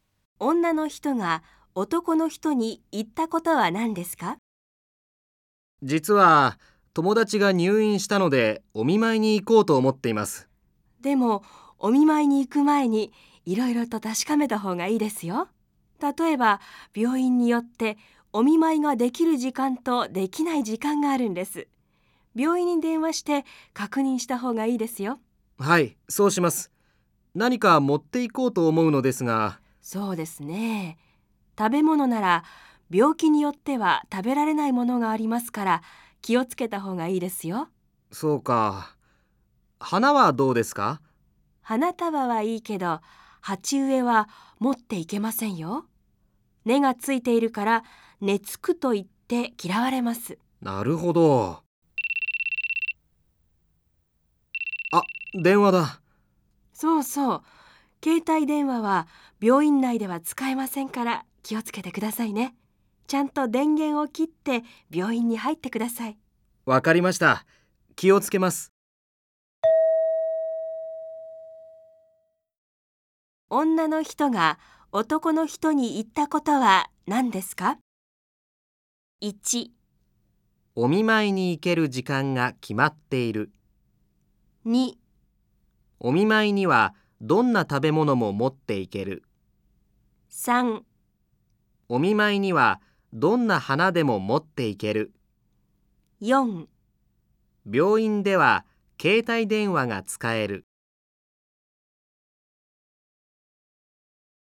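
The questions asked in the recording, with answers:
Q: 女の人が男の人に言ったことは何ですか?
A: 1: お見舞いに行ける時間が決まっている。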